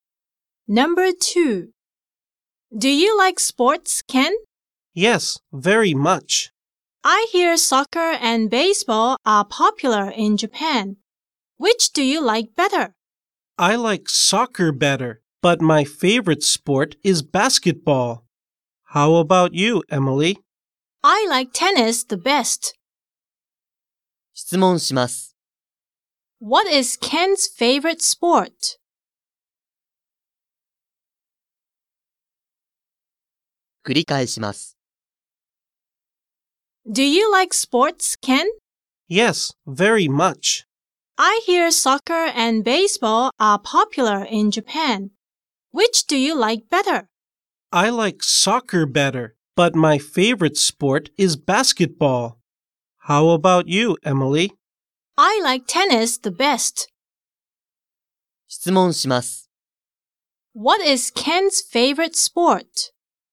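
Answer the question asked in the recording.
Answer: Basketball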